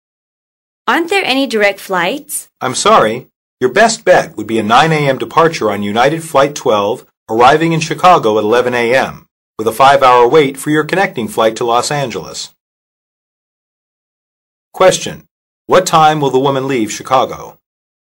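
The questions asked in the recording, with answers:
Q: What time will the woman leave Chicago?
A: 4 p.m.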